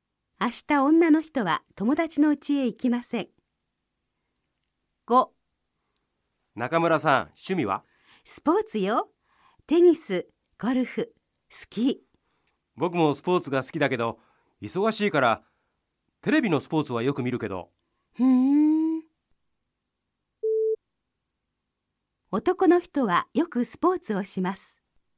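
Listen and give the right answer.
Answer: ×(忙しいのでテレビでスポーツを見る)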